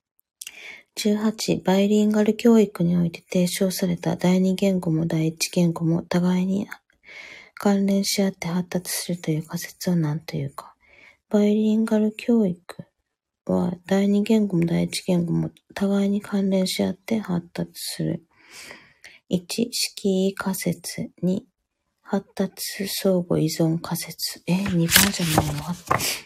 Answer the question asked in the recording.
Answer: 答えは2番。